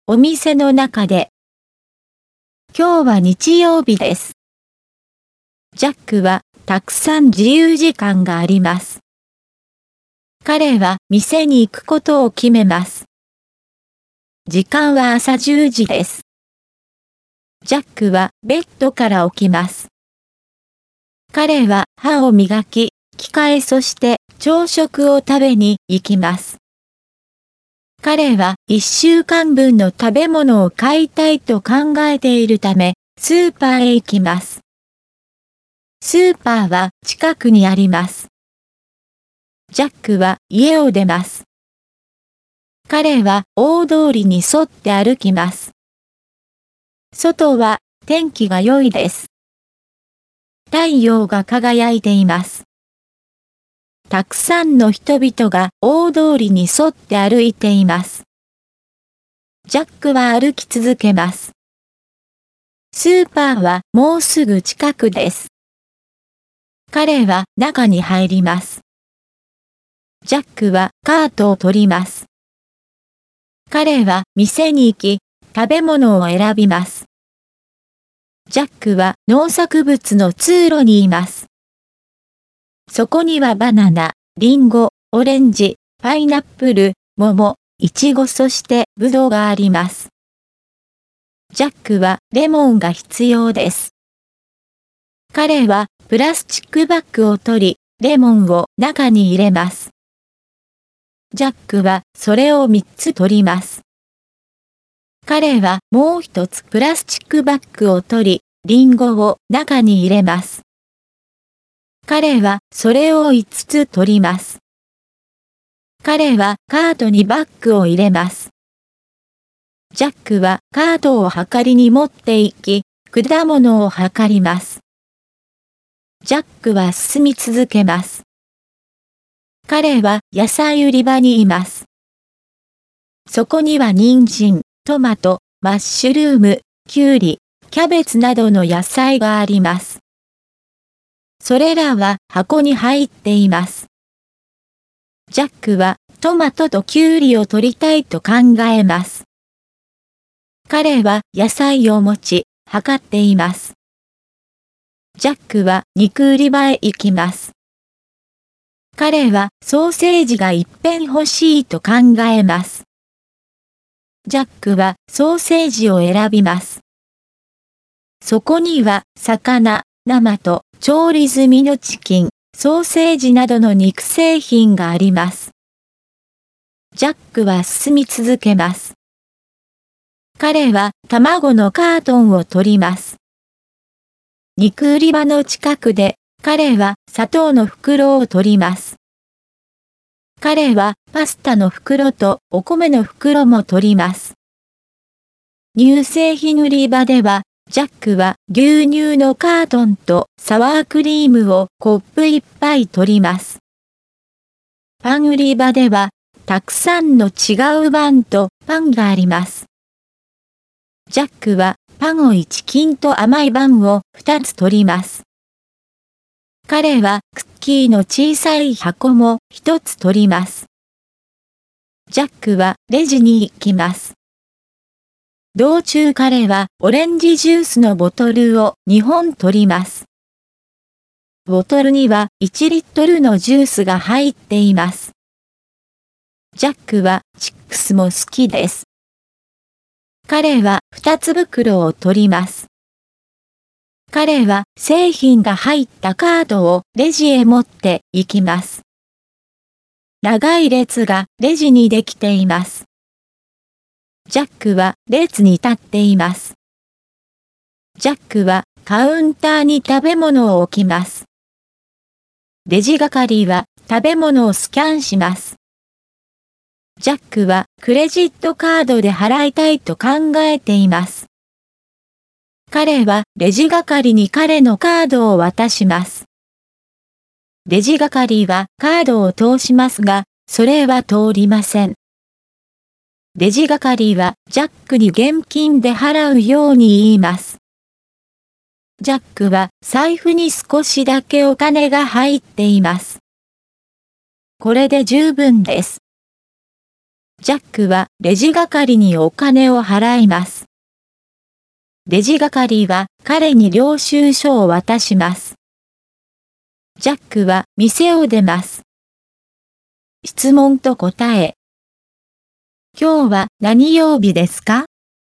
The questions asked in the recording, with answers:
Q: 今日は何曜日ですか?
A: 今日は日曜日です。